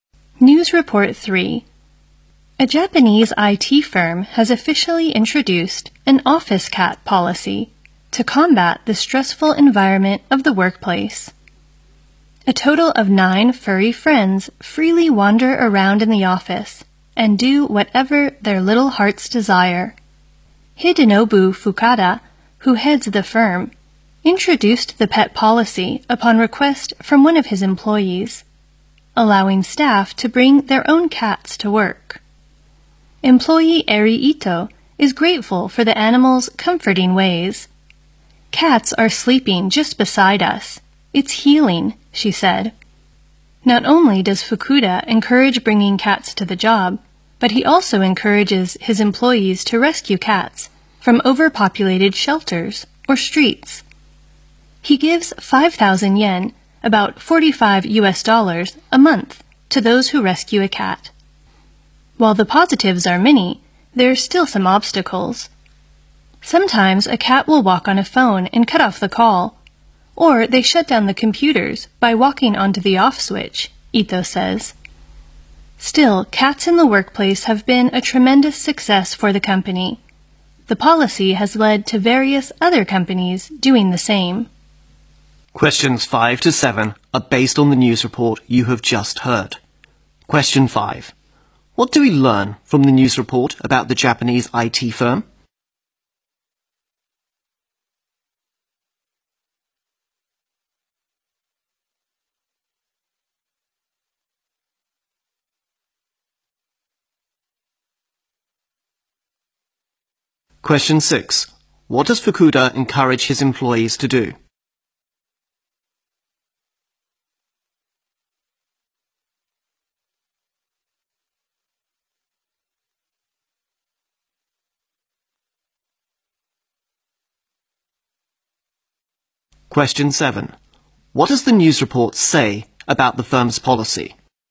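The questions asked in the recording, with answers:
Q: What do we learn from the news report about the Japanese IT firm?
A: It introduced an office cat policy to reduce workplace stress

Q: What does Fukuda encourage his employees to do?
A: Rescue cats from shelters or streets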